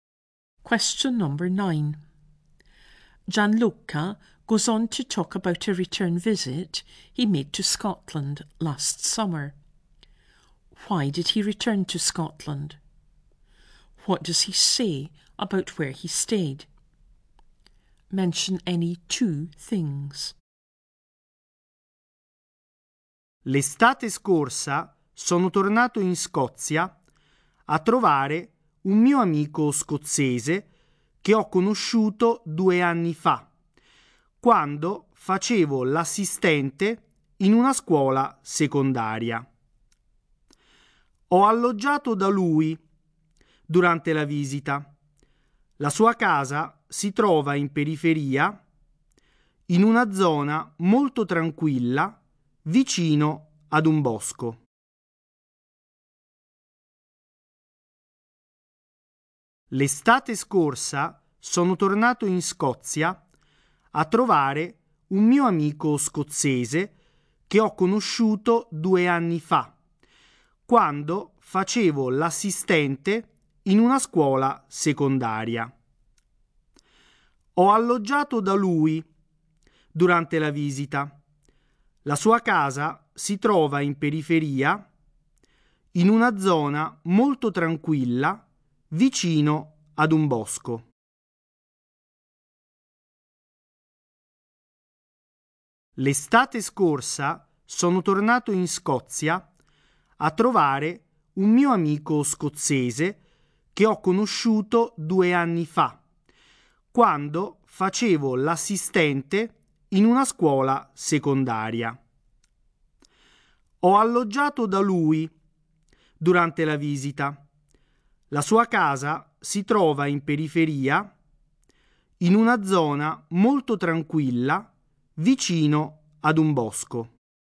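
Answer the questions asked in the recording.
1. To visit a Scottish friend he met two years ago as an assistant in a secondary school
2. At his friend's house, in the suburbs, a very quiet area, near a wood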